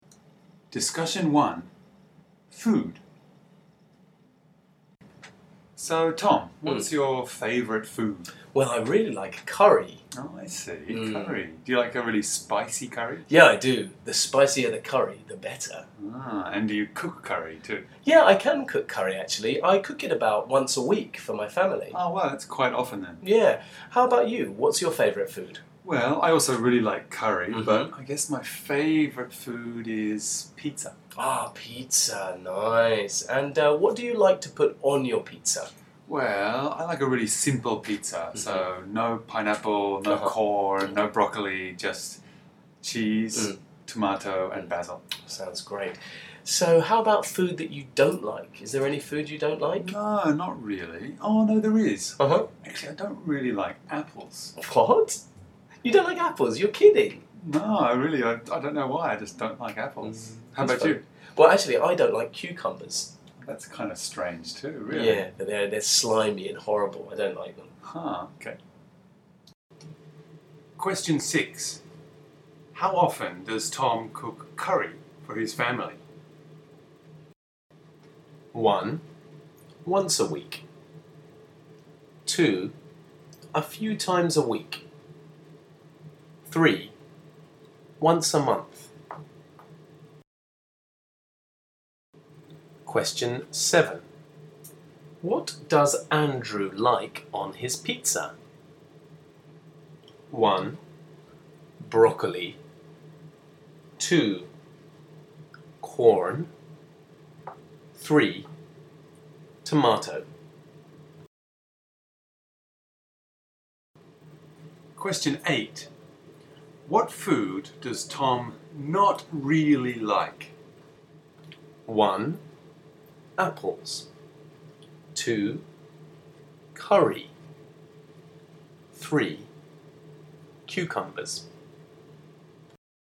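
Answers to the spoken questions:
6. 1: Once a week
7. 3: Tomato
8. 1: Apples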